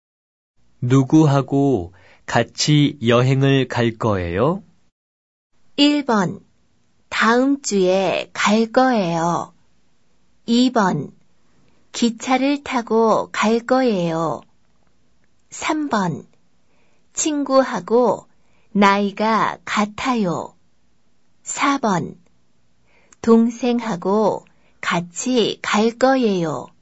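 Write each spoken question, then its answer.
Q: 누구하고 같이 여행을 갈 거예요?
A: 4: 동생하고 같이 갈 거예요.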